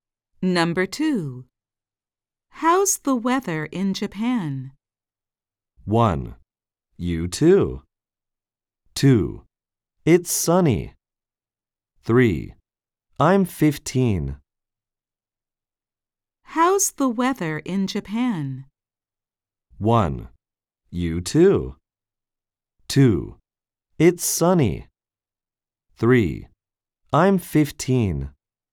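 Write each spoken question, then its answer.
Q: How's the weather in Japan?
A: 2: It's sunny.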